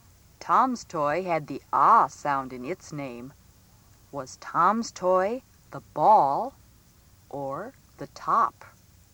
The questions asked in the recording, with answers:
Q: Was Tom's toy the ball or the top?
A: You should have circled the top.